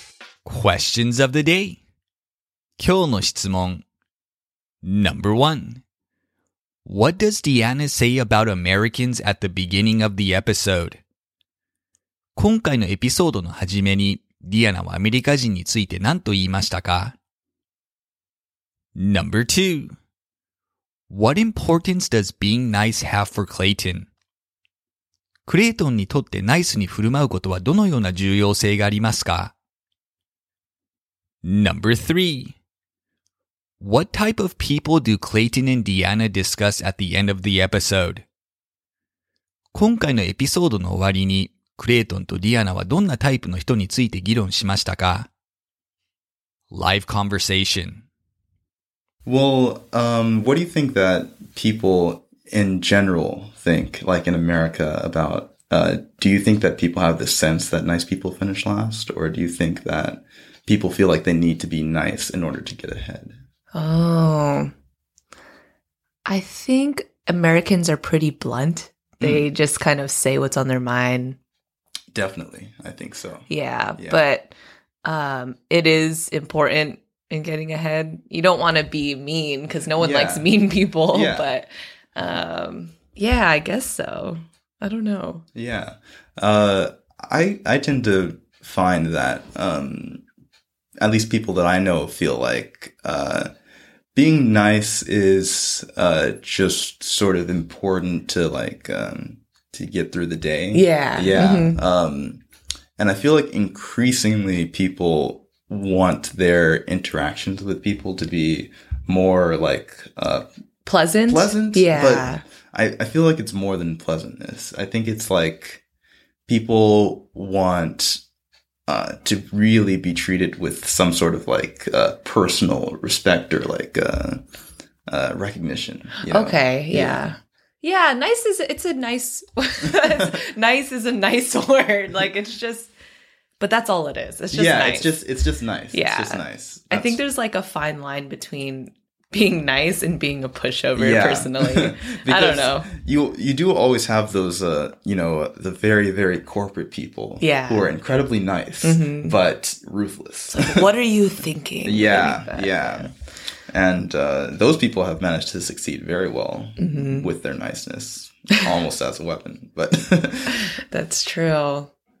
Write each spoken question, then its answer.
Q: What does Deanna say about Americans at the beginning of the episode?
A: Deanna thinks Americans are usually pretty blunt about how they feel.

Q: What importance does being nice have for Clayton?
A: Clayton thinks being nice is useful for getting through the day, but little else beyond that.

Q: What type of people do Clayton and Deanna discuss at the end of the episode?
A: They talk about corporate personalities who are capable of niceness but have ruthless calculating qualities that have helped them succeed anyway.